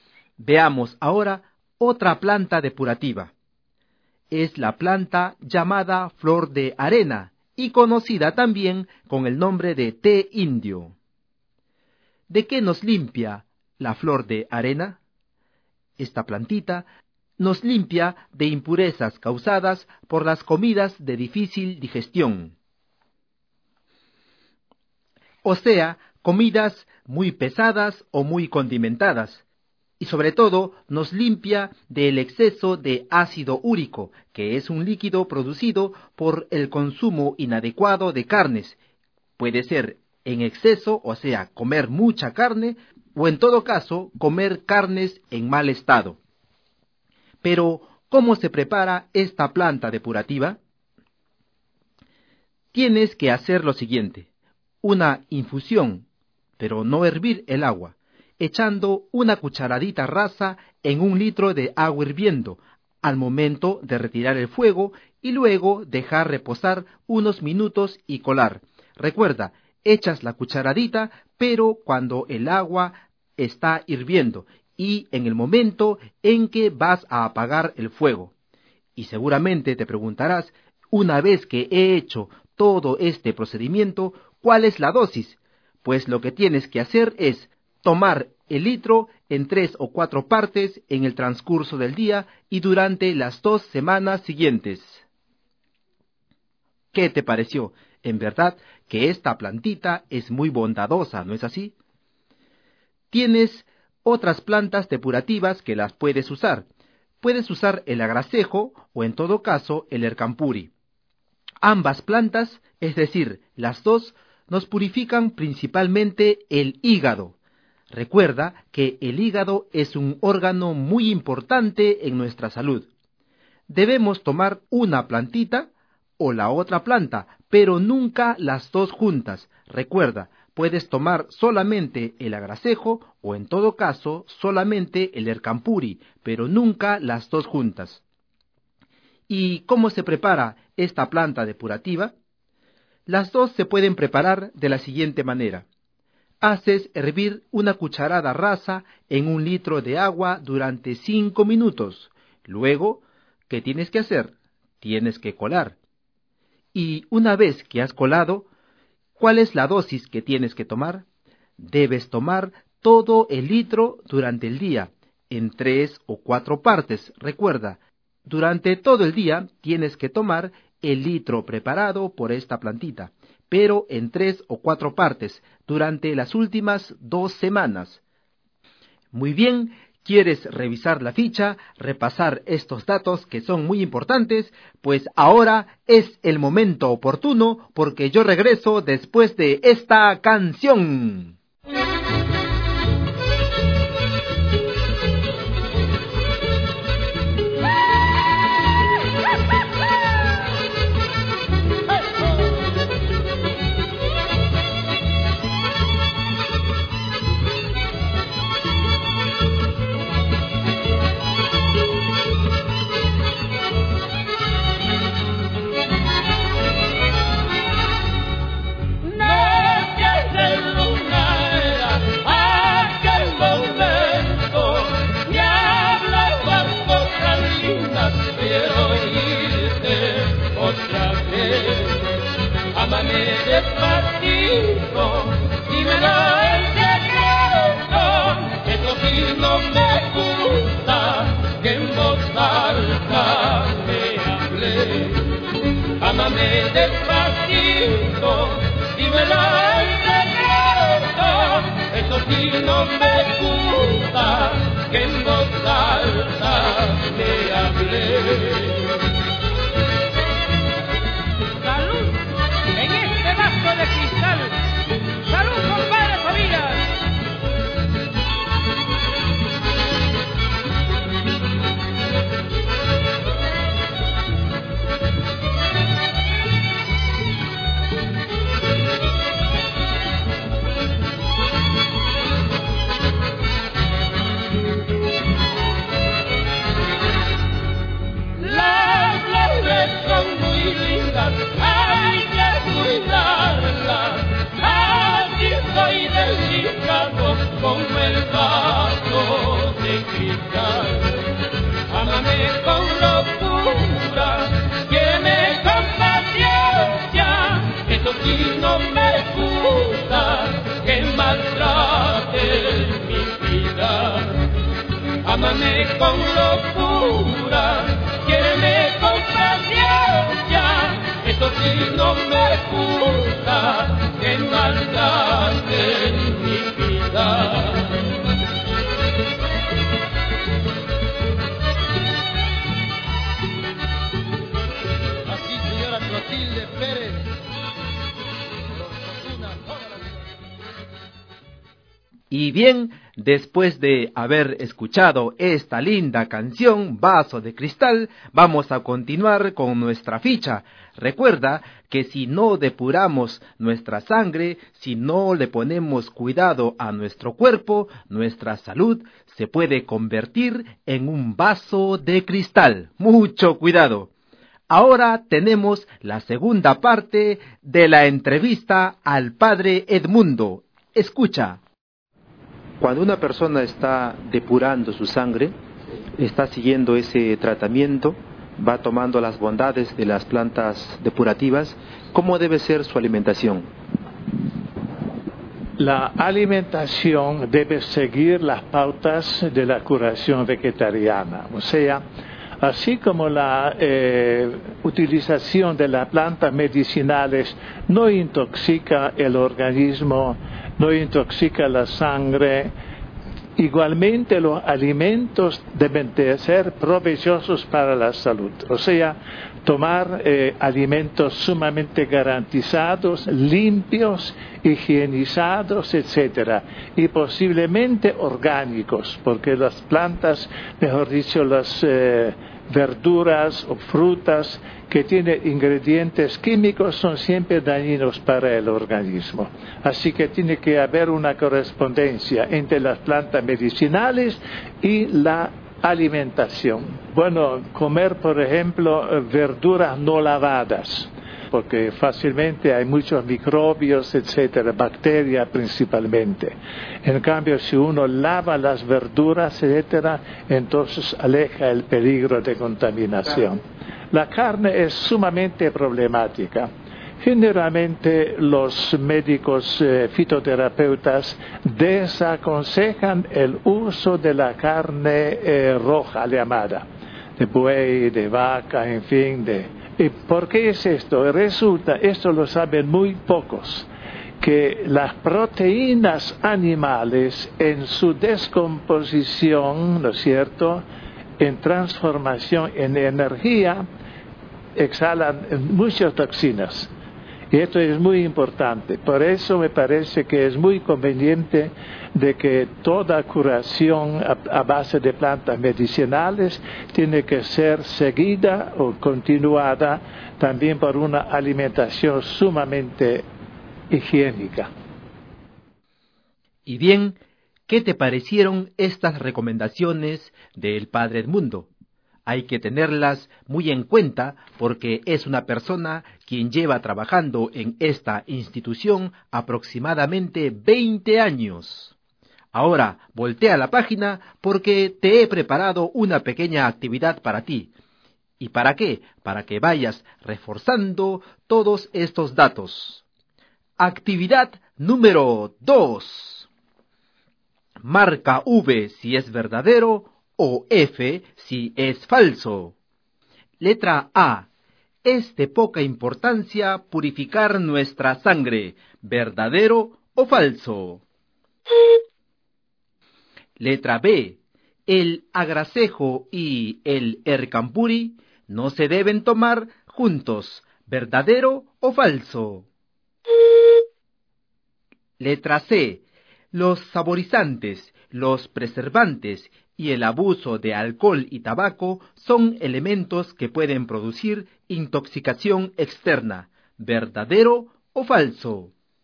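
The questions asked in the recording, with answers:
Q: Es de poca importancia purificar nuestra sangre, ¿verdadero o falso?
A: Falso

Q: El agracejo y el ercampuri no se deben tomar juntos, ¿verdadero o falso?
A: Verdadero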